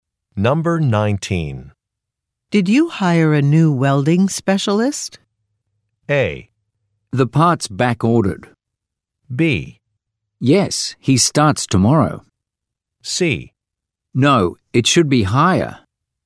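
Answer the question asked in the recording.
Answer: B: Yes, he starts tomorrow.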